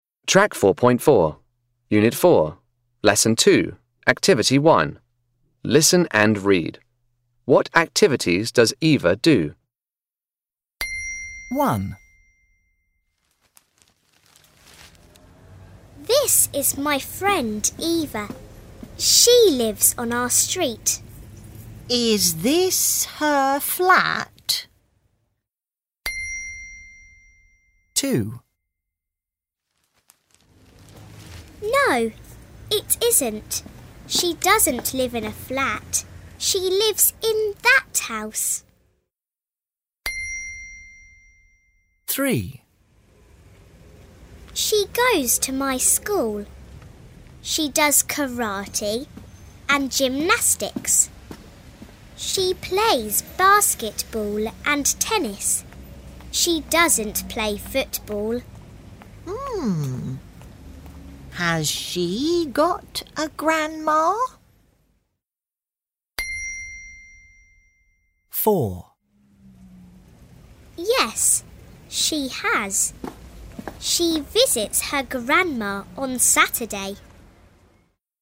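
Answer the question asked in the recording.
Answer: karate, gymnastics, basketball and tennis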